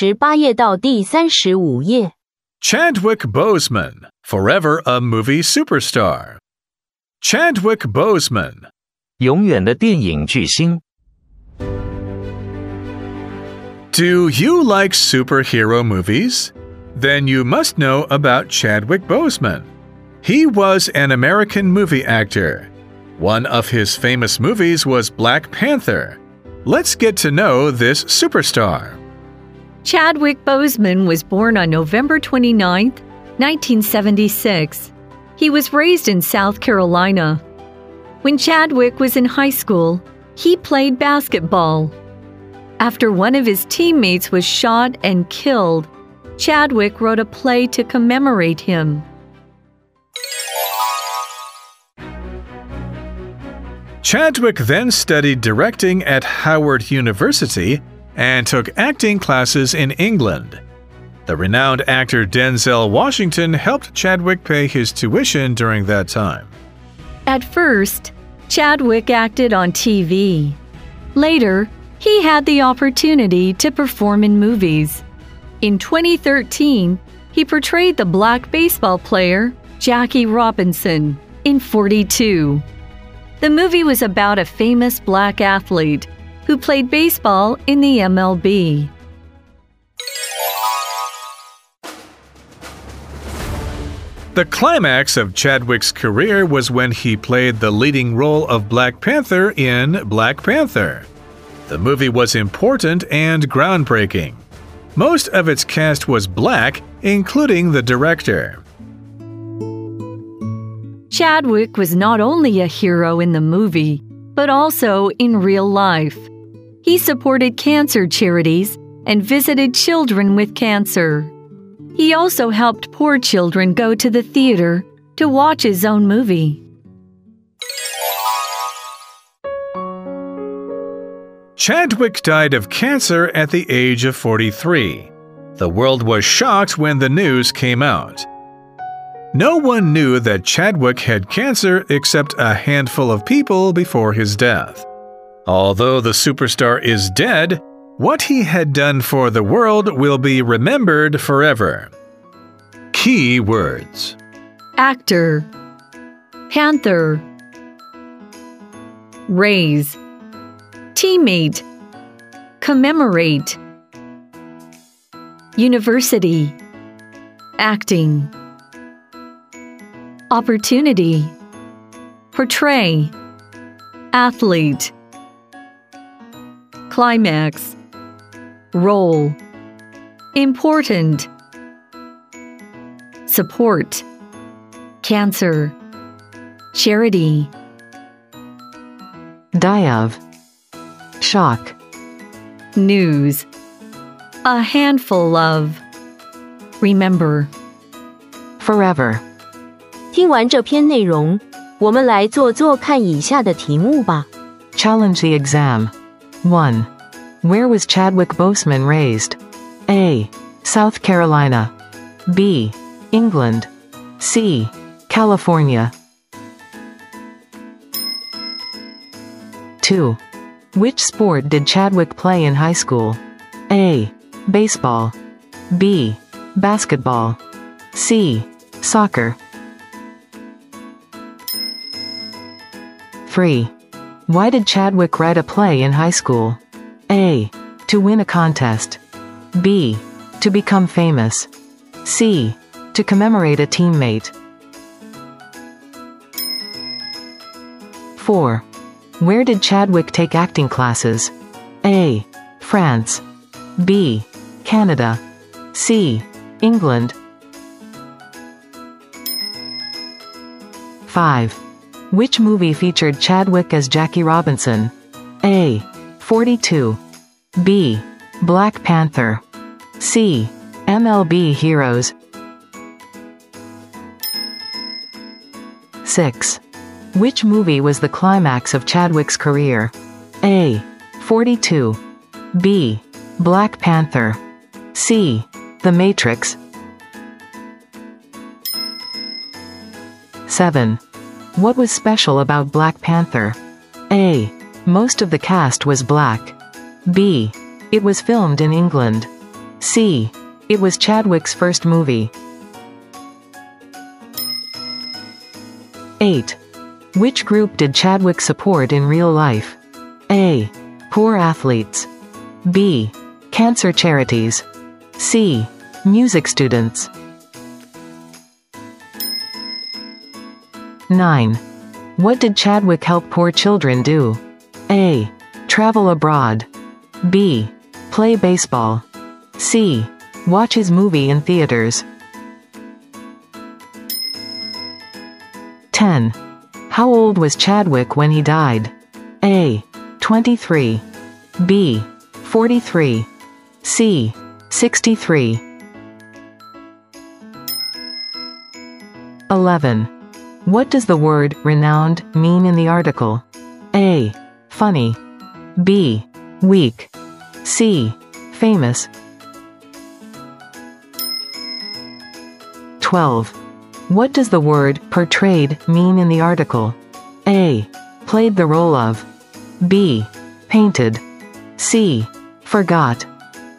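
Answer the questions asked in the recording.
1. A: South Carolina.
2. B: Basketball.
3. C: To commemorate a teammate.
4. C: England.
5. A: 42.
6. B: Black Panther.
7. A: Most of the cast was black.
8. B: Cancer Charities.
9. C: Watch his movie in theaters.
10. B: 43.
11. C: Famous.
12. A: Played the role of.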